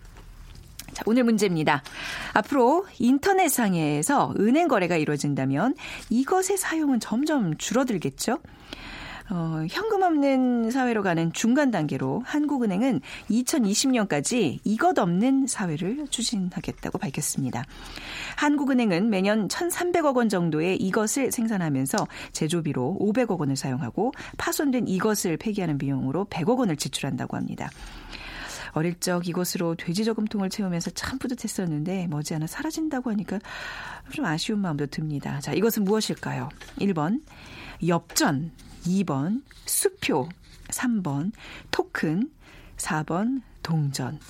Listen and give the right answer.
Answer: 아, 4번 동전이었습니다.